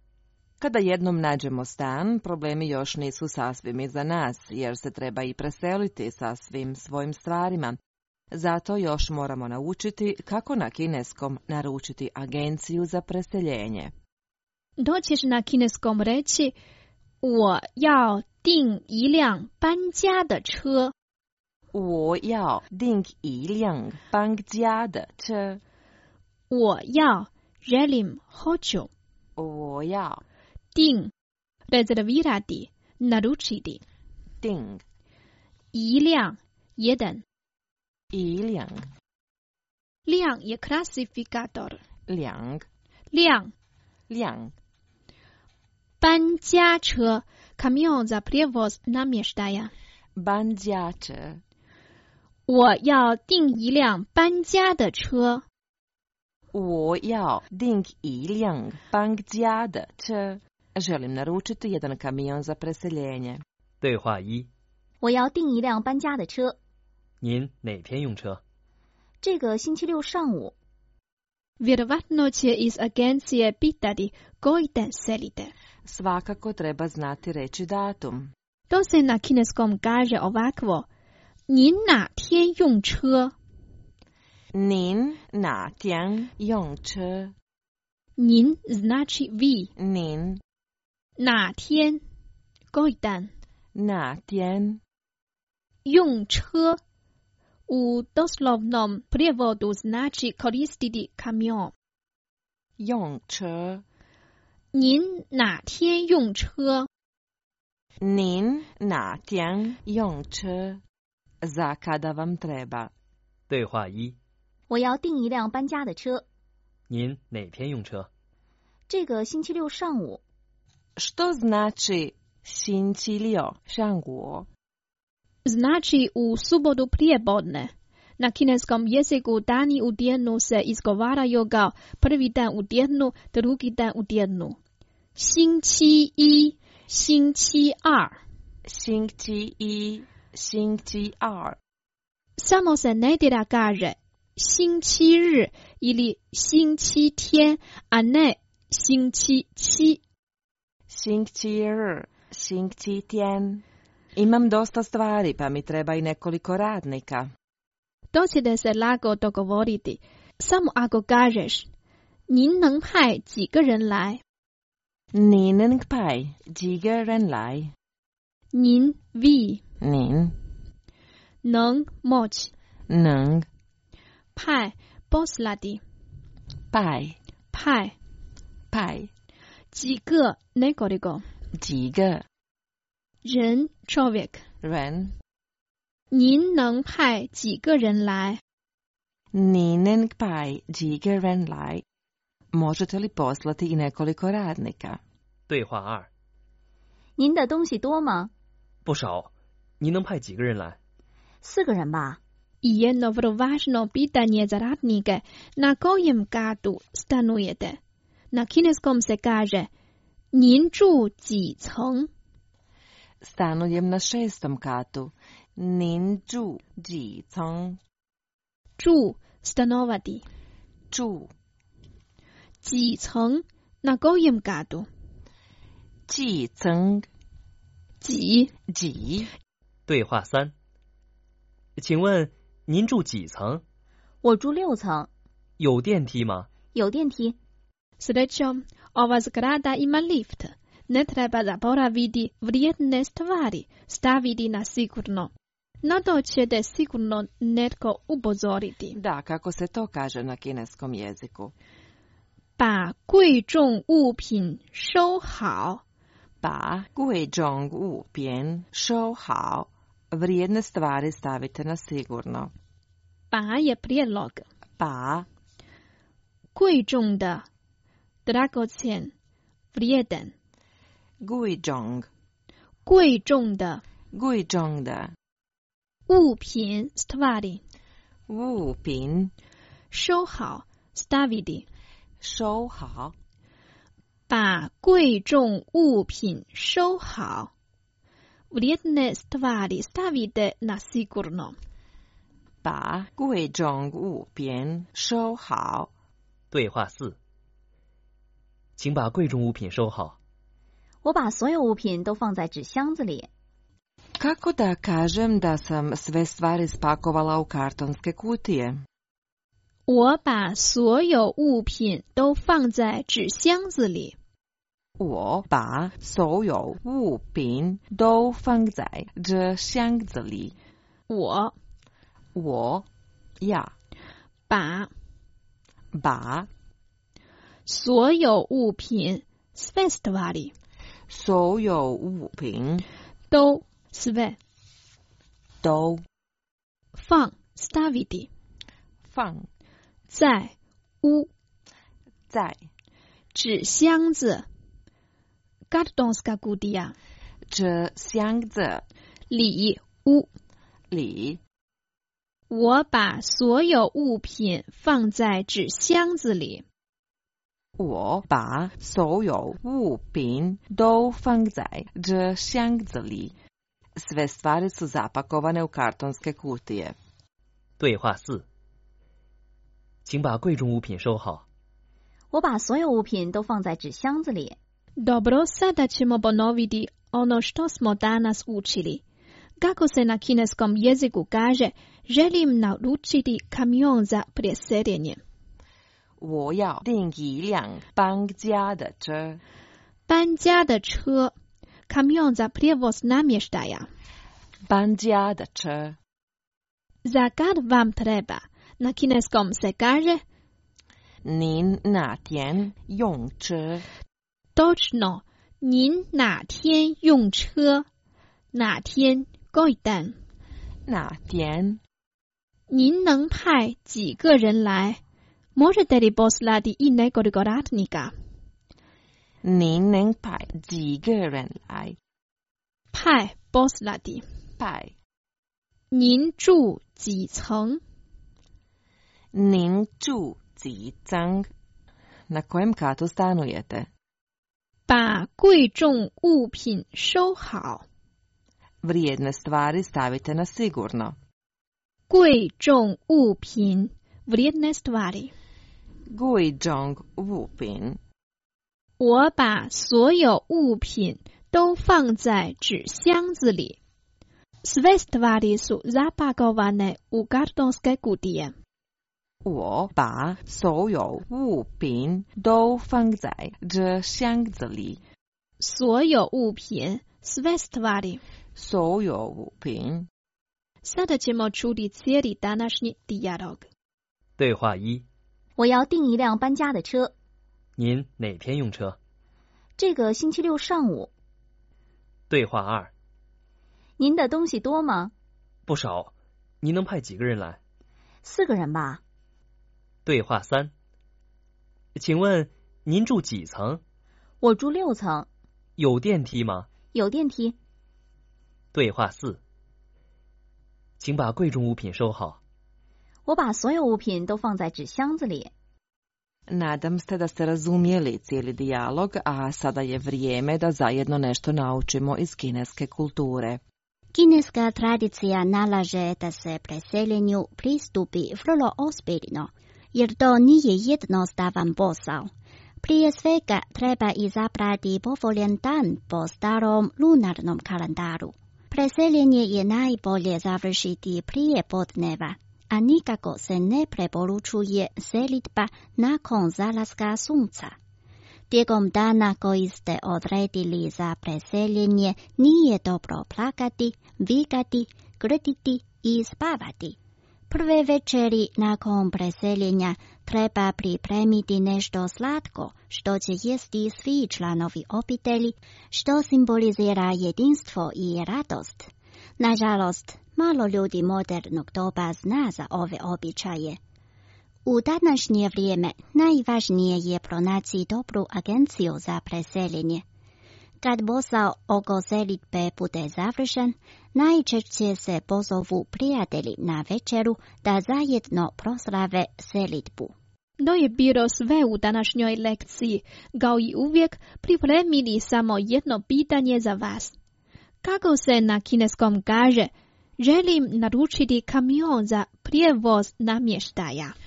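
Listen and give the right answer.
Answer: 我要订一辆搬家的车。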